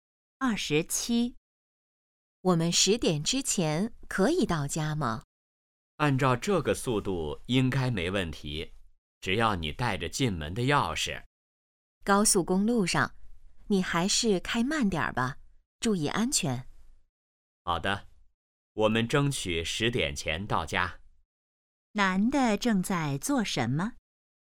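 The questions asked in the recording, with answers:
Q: 男的正在做什么?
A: 开车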